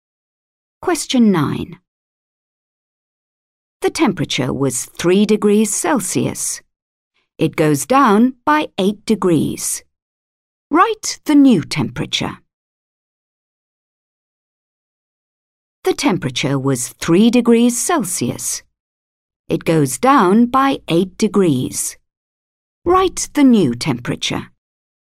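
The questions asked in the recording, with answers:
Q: Write the new temperature.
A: -5 degrees Celsius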